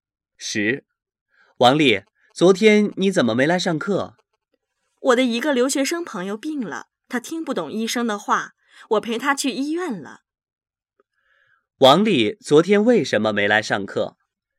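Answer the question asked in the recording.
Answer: 她陪生病的留学生朋友去医院了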